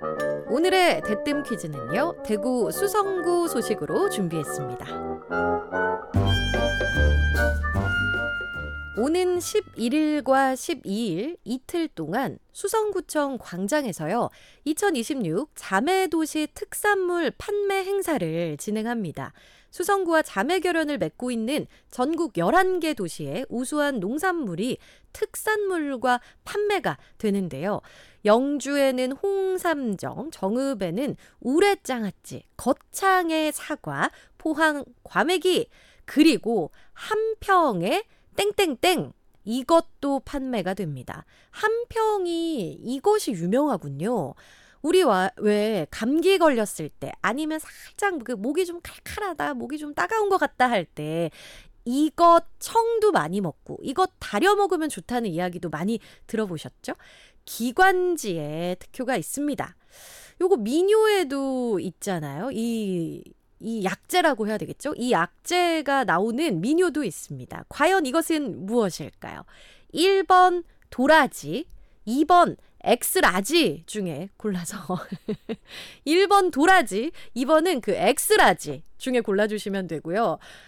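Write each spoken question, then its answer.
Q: 과연 이것은 무엇일까요? 1번 도라지, 2번 엑스라지 중에 골라서 1번 도라지, 2번은 그 엑스라지 중에 골라주시면 되고요.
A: 1: 도라지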